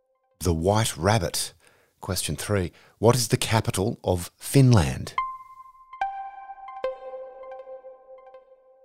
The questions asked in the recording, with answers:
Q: What is the capital of Finland?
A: Helsinki.